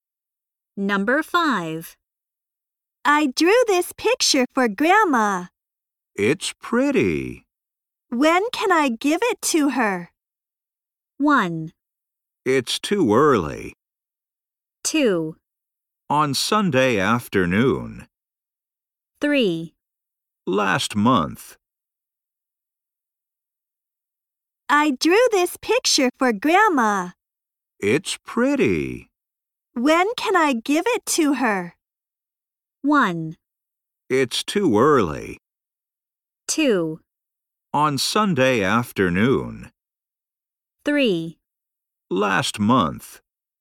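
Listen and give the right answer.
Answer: 2: On Sunday afternoon.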